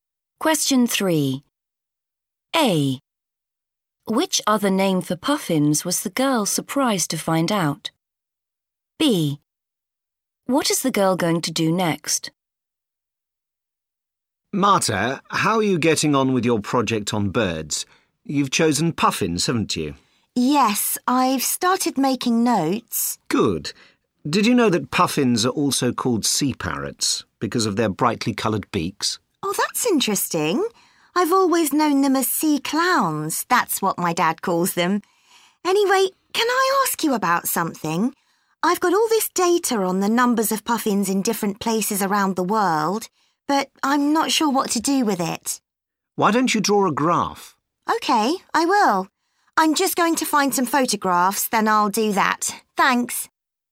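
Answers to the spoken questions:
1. sea parrots
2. find some photographs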